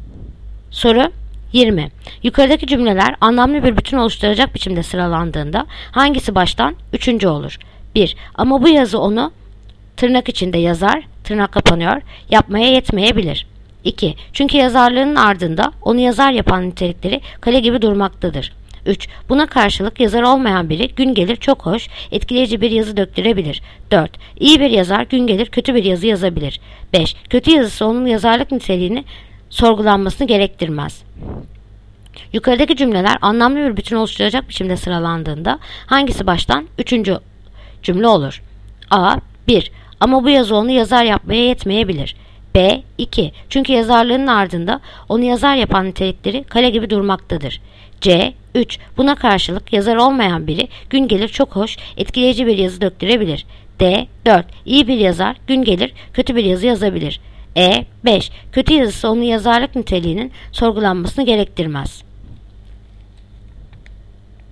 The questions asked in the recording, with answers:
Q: Yukarıdaki cümleler anlamlı bir bütün oluşturacak biçimde sıralandığında hangisi baştan üçüncü cümle olur?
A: Yanıt Bursa. 2. Çünkü yazarlığın ardında onu yazar yapan nitelikleri kale gibi durmaktadır.